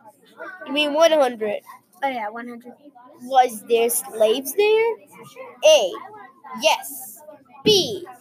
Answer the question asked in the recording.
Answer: The answer was yes.